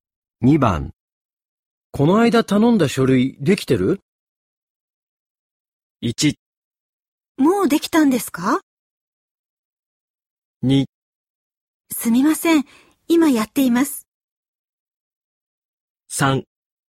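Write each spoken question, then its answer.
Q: この間頼んだ書類できてる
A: 2: すみません。今やっています。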